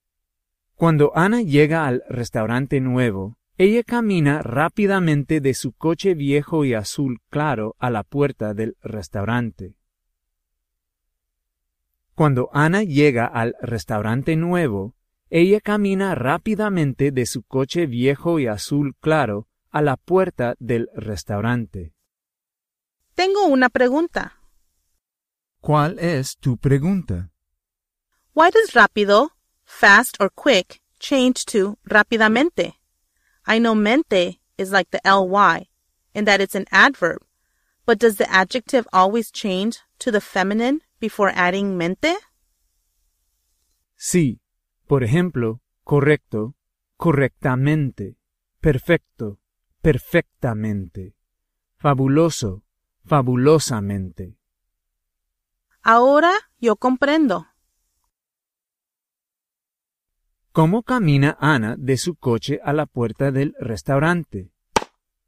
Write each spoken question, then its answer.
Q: ¿Cómo camina Ana de su coche a la puerta del restaurante?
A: Rápidamente.